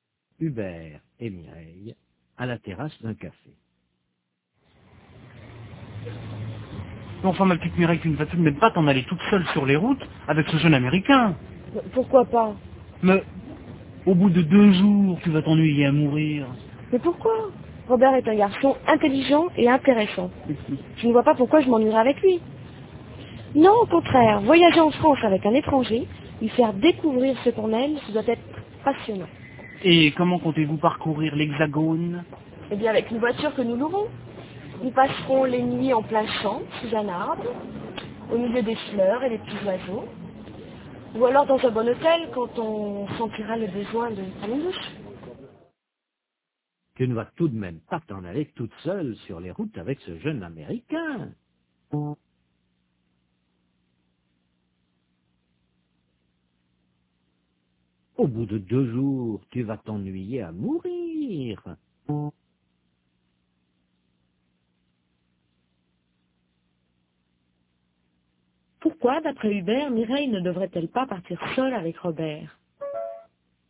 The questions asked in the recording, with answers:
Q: Pourquoi, d'après Hubert, Mireille ne devrait-elle pas partir seule avec Robert ?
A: Parce qu'au bout de 2 jours, elle va s'ennuyer à mourir.